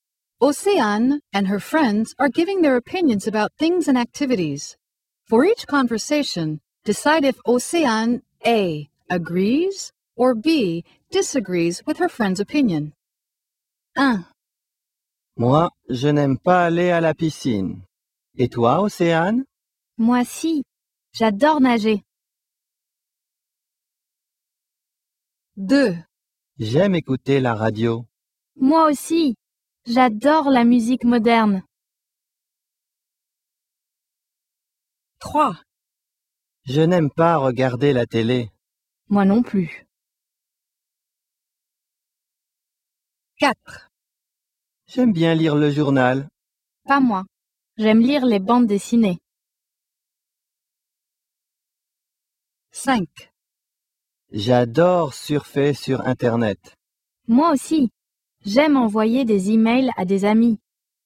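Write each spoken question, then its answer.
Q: For each conversation, decide if Océane A agrees or B disagrees with her friend's opinion.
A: B: disagrees

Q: For each conversation, decide if Océane A agrees or B disagrees with her friend's opinion.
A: A: agrees

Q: For each conversation, decide if Océane A agrees or B disagrees with her friend's opinion.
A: A: agrees

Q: For each conversation, decide if Océane A agrees or B disagrees with her friend's opinion.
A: B: disagrees

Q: For each conversation, decide if Océane A agrees or B disagrees with her friend's opinion.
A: A: agrees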